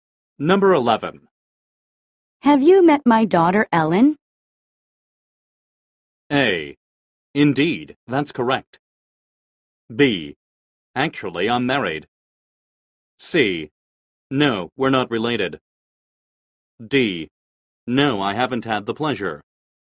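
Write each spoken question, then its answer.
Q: Have you met my daughter, Ellen?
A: D: No, I haven't had the pleasure.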